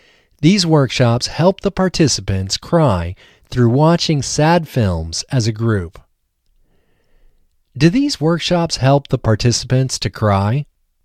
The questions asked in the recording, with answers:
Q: Do these workshops help the participants to cry?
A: Yes, these workshops help the participants to cry.